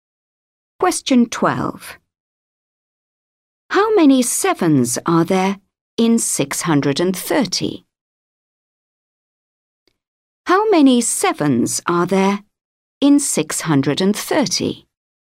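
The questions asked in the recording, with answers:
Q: How many sevens are there in 630?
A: 90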